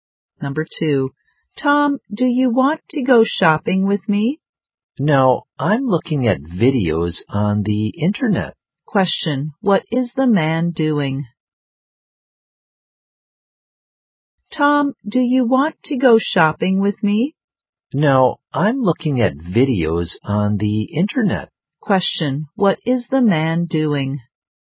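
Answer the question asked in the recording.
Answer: Watching videos on the internet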